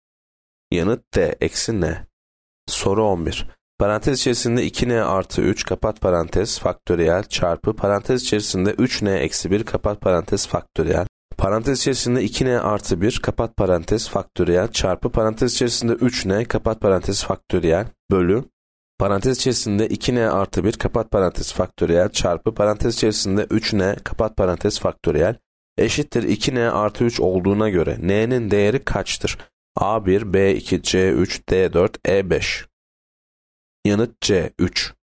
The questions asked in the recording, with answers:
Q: Parantez içerisinde 2n artı 1 kapat parantez faktöriyel çarpı parantez içerisinde 3n kapat parantez faktöriyel bölü parantez içerisinde 2n artı 1 kapat parantez faktöriyel çarpı parantez içerisinde 3n kapat parantez faktöriyel eşittir 2n artı 3 olduğuna göre n'nin değeri kaçtır?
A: Yanıt C 3.